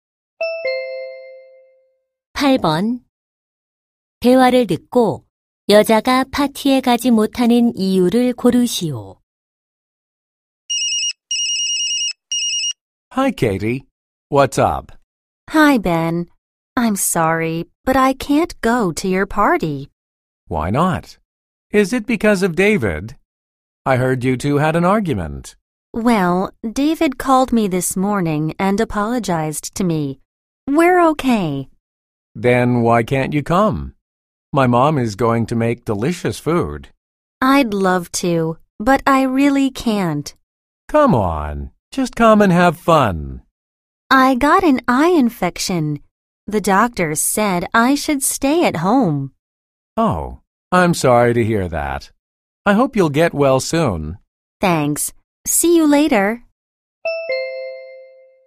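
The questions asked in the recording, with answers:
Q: 대화를 듣고 여자가 파티에 가지 못하는 이유를 고르시오.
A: 눈병(안구 감염)으로 집에 있어야 해서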